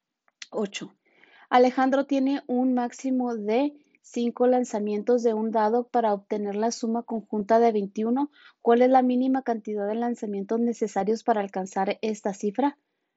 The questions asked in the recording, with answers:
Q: Alejandro tiene un máximo de 5 lanzamientos de un dado para obtener la suma conjunta de 21. ¿Cuál es la mínima cantidad de lanzamientos necesarios para alcanzar esta cifra?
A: Y la respuesta correcta es la C, 4.